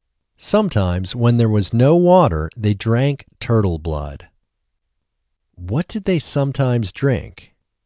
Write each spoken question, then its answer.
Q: What did they sometimes drink?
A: They sometimes drank turtle blood.